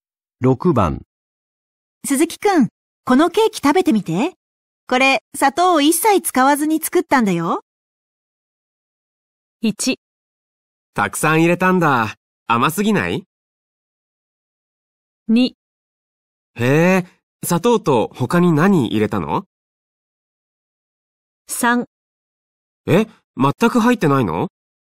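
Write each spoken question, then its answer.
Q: ケーキ食べてみて。これ、砂糖を一切使わずに作ったんだよ。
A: 3: え、全く入ってないの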